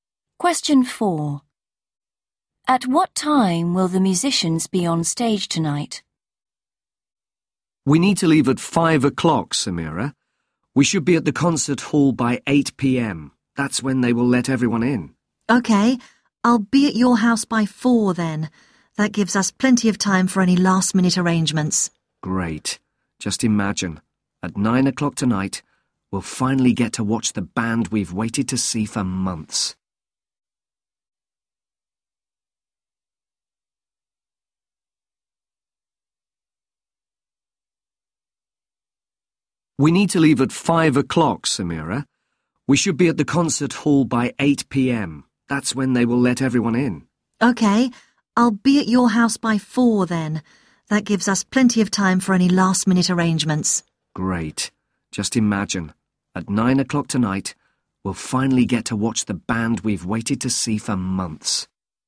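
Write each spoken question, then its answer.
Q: At what time will the musicians be on stage tonight?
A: 9 o'clock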